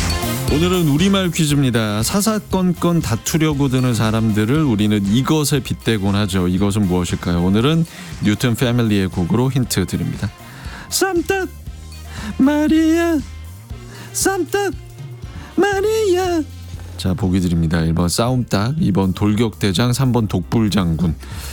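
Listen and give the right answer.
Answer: 1: 싸움닭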